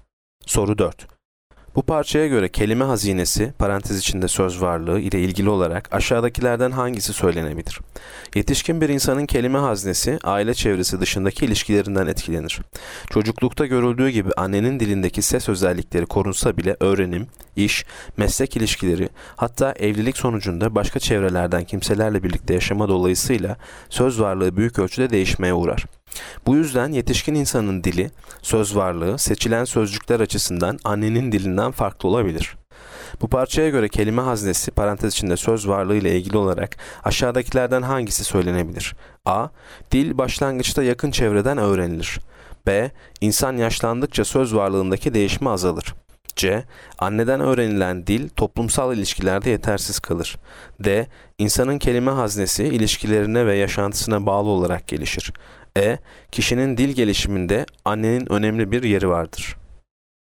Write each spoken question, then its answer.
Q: Bu parçaya göre kelime haznesi, parantez içinde söz varlığı ile ilgili olarak aşağıdakilerden hangisi söylenebilir?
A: Yanıt D. İnsanın kelime haznesi ilişkilerine ve yaşantısına bağlı olarak gelişir.